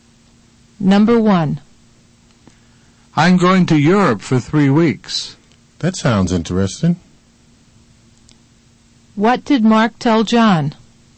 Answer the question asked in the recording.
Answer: He told John he was going to Europe for 3 weeks.